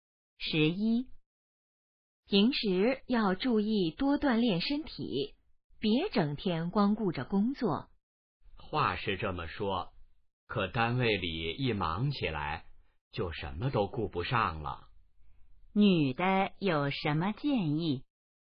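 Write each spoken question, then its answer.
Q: 女的有什么建议?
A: 多锻炼身体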